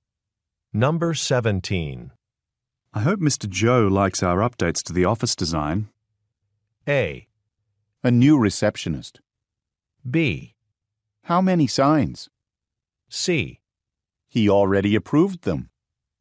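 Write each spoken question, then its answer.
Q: I hope Mr. Joe likes our updates to the office design.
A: C: He already approved them.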